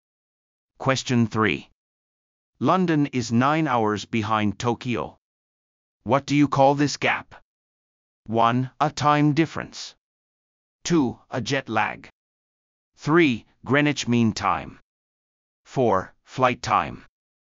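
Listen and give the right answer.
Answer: 1: A time difference.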